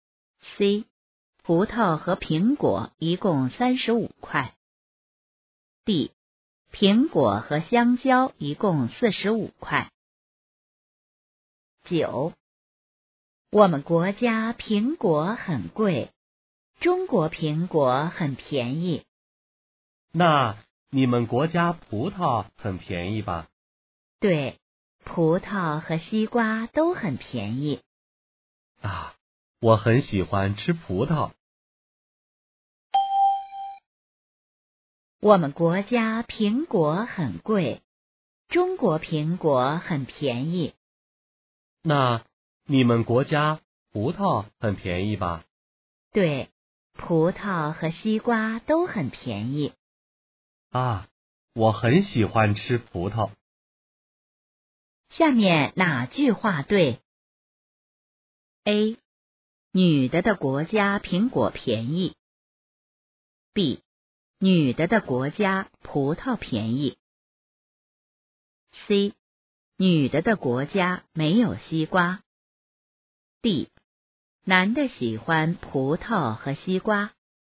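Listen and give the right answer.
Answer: B: 女的的国家葡萄便宜。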